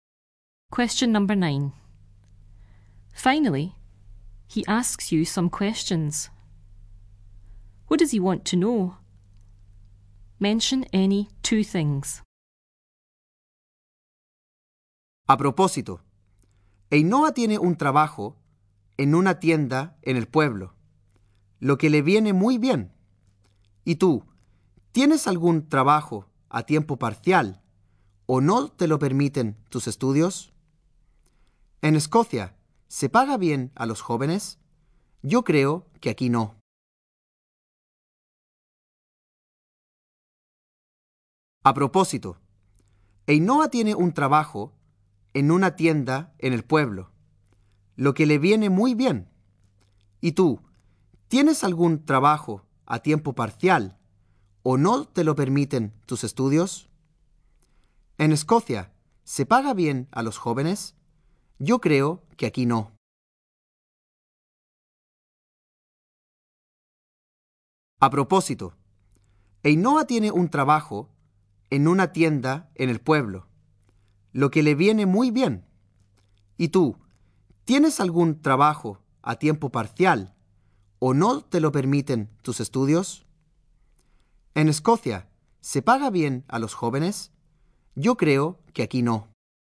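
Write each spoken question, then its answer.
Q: What does he want to know?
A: Whether you have a part-time job (or your studies don't allow it); whether young people are well paid in Scotland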